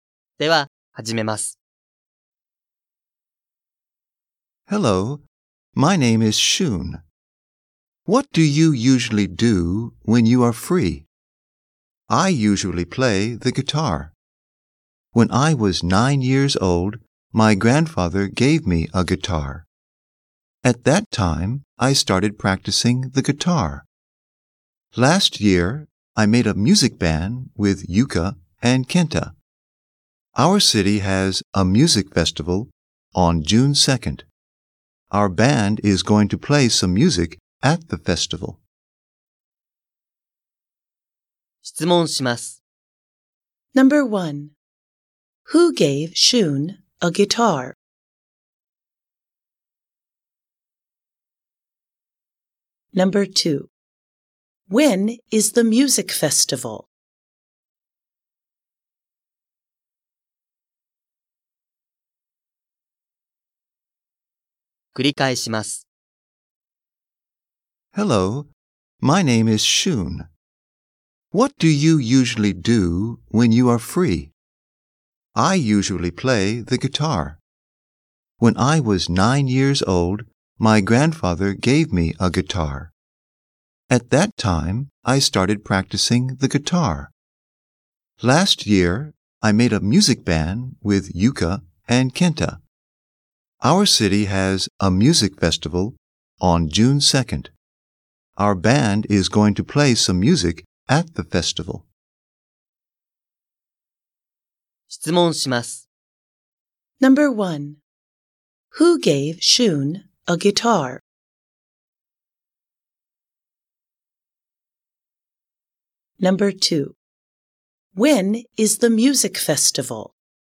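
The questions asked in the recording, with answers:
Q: Who gave Shun a guitar?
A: His grandfather

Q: When is the music festival?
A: On June 2nd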